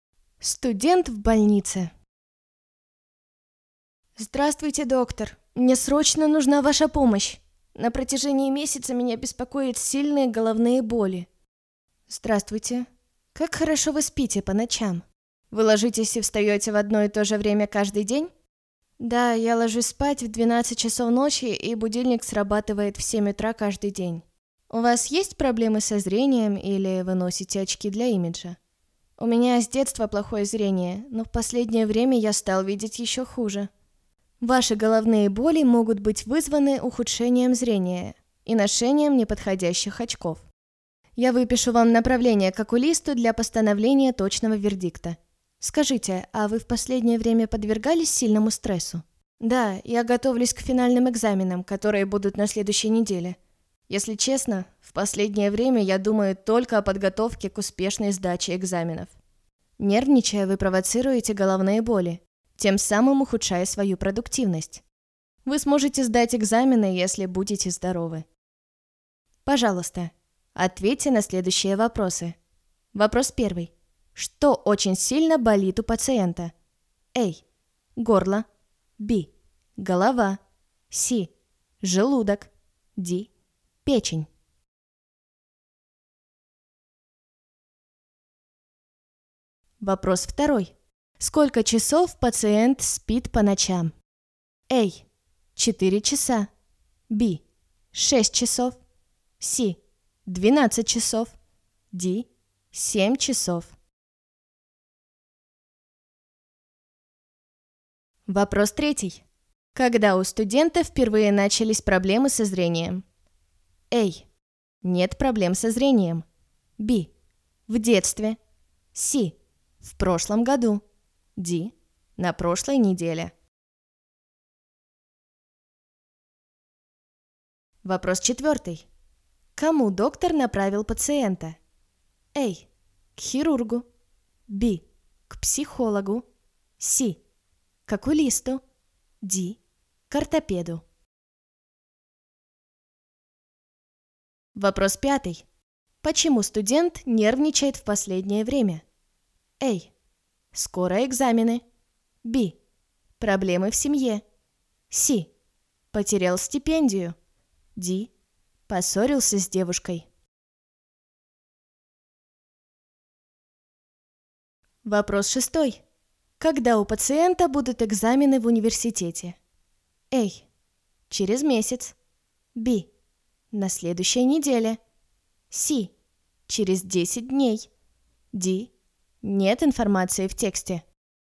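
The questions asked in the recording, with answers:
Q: Что очень сильно болит у пациента?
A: B: Голова

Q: Сколько часов пациент спит по ночам?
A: D: 7 часов

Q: Когда у студента впервые начались проблемы со зрением?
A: B: В детстве

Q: Кому доктор направил пациента?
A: C: К окулисту

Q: Почему студент нервничает в последнее время?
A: A: Скоро экзамены

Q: Когда у пациента будут экзамены в университете?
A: B: На следующей неделе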